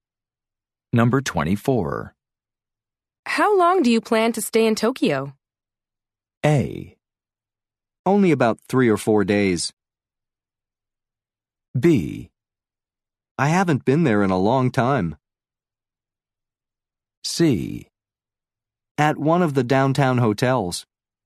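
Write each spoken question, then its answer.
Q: How long do you plan to stay in Tokyo?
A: A: Only about 3 or 4 days.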